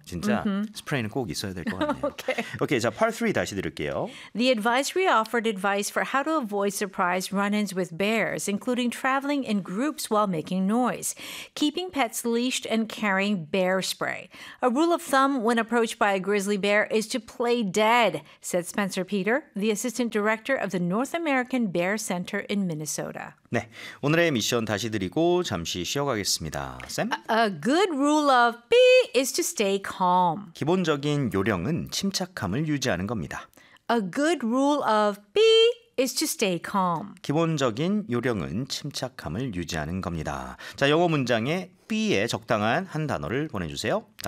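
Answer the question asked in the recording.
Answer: thumb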